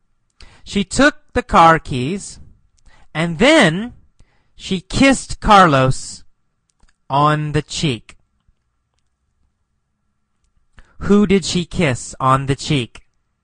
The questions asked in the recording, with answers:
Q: Who did she kiss on the cheek?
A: Carlos. She kissed Carlos on the cheek.